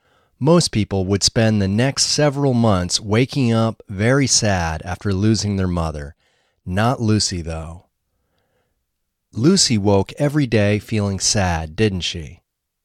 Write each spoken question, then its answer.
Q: Lucy woke every day feeling sad, didn't she?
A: No, she didn't wake up feeling sad.